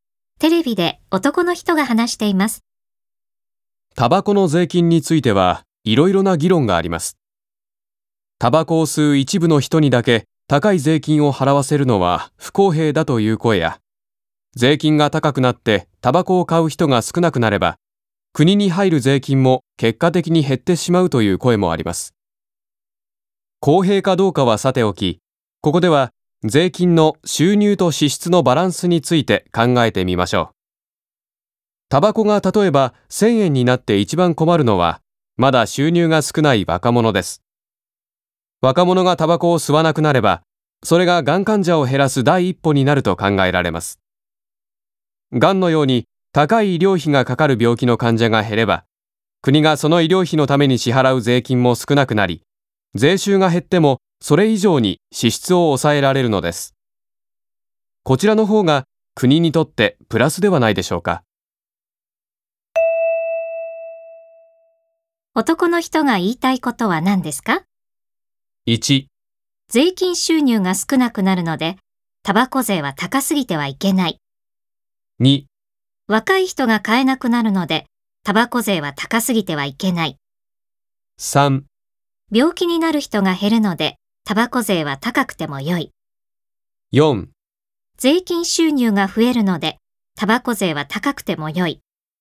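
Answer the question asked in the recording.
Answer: 3: 病気になる人が減るので、タバコ税は高くてもよい。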